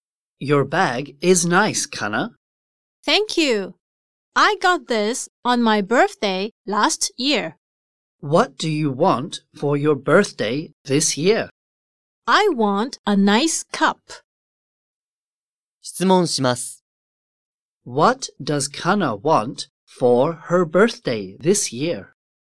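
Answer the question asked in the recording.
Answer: A nice cup.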